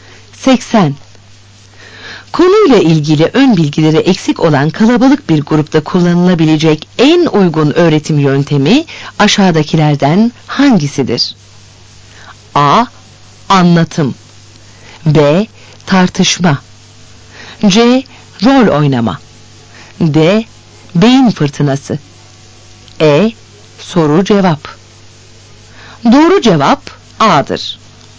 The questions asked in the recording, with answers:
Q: Konuyla ilgili ön bilgileri eksik olan kalabalık bir grupta kullanılabilecek en uygun öğretim yöntemi aşağıdakilerden hangisidir?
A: Doğru cevap A'dır.